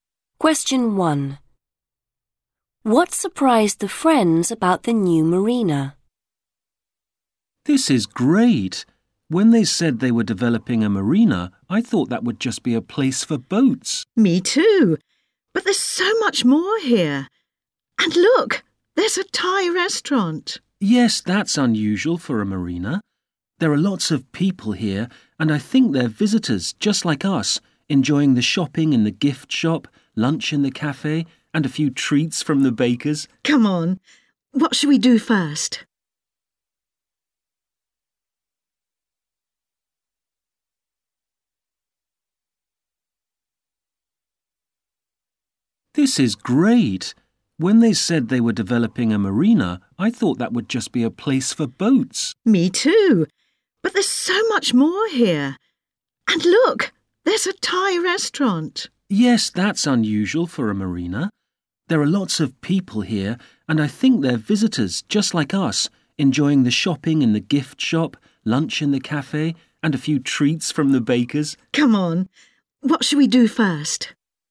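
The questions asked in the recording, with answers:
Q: What surprised the friends about the new marina?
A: There's so much more than boats, e.g. a Thai restaurant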